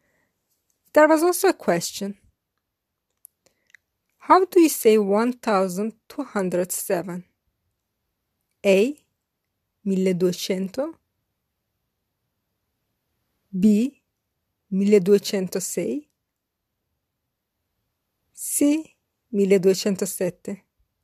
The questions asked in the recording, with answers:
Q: How do you say 1,207?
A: The correct answer is C.